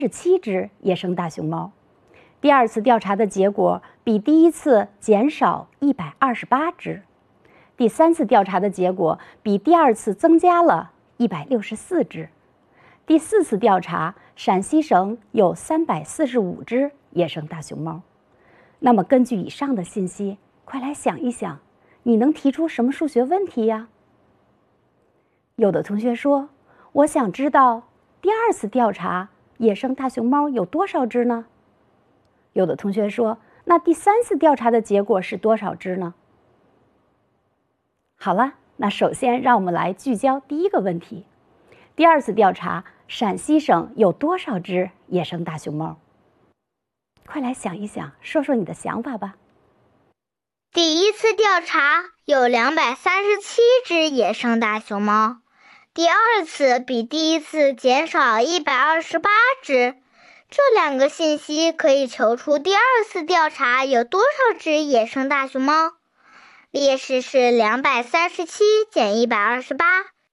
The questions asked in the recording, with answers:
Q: 第二次调查,陕西省有多少只野生大熊猫?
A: 所以第二次调查有109只野生大熊猫